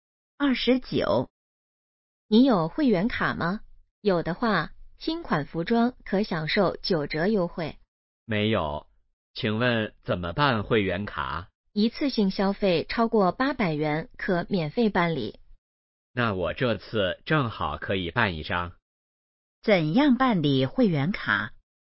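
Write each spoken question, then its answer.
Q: 怎样办理会员卡?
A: 一次性消费超过800元可免费办理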